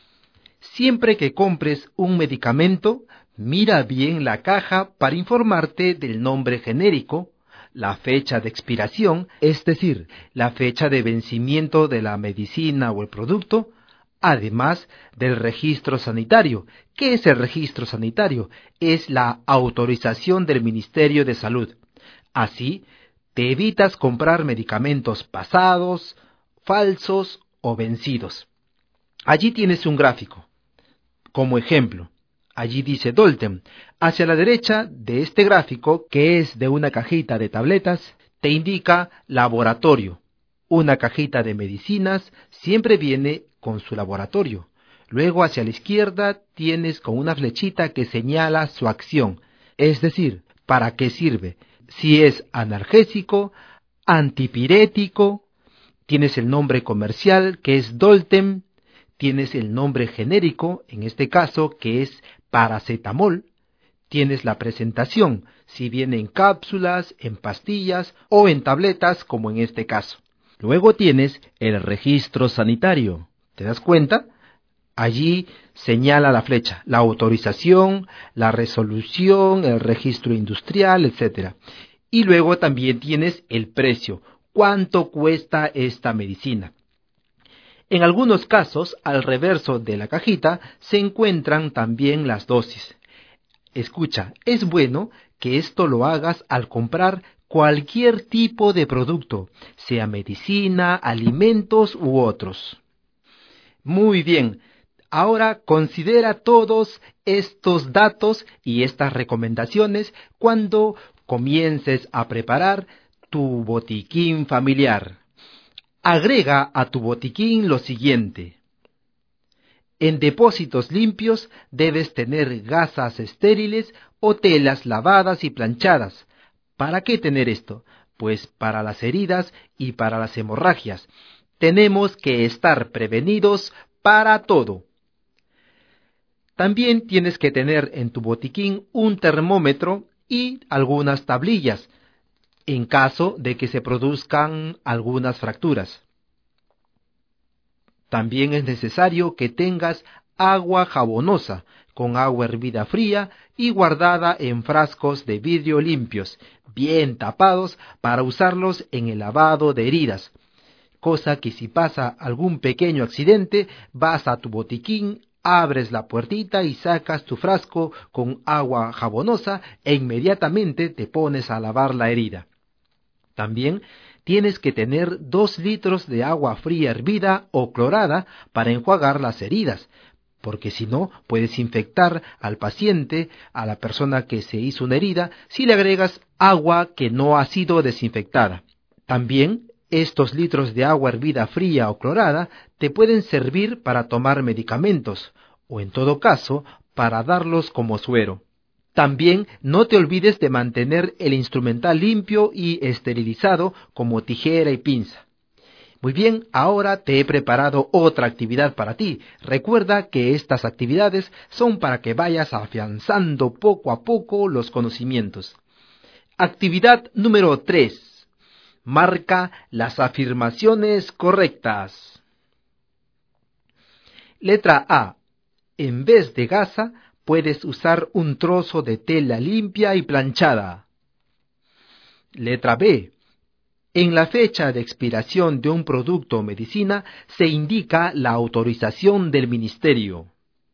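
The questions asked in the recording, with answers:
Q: En vez de gasa, puedes usar un trozo de tela limpia y planchada.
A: Correcta

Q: En la fecha de expiración de un producto o medicina, se indica la autorización del ministerio.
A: Incorrecta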